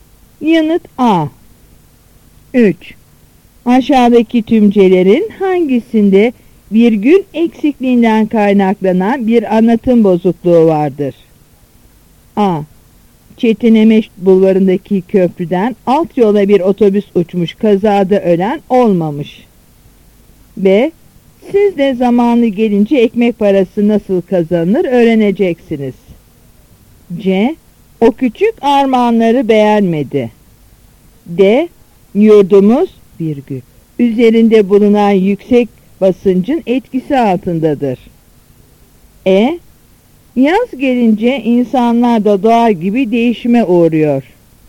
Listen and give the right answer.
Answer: Yanıt C.